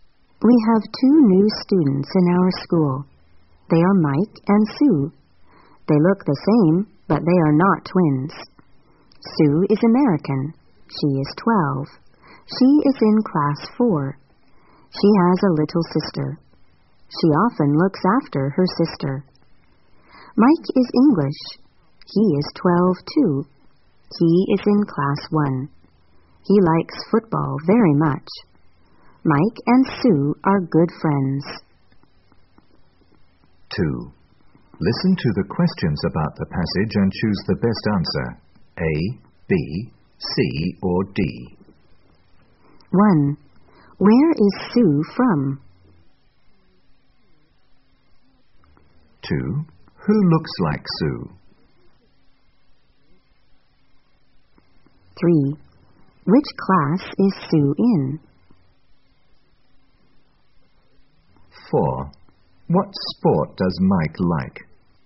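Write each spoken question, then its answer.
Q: Where is Sue from?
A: America

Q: Who looks like Sue?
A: Mike

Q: Which class is Sue in?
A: Class 4

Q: What sport does Mike like?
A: Football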